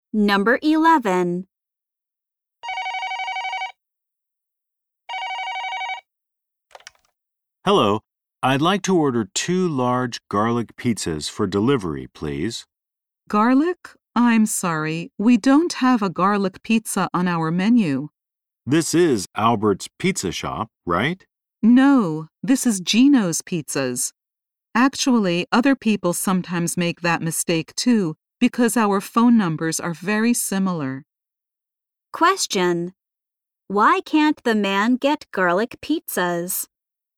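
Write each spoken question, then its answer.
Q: why can't the man get garlic pizzas?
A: He called the wrong pizza shop.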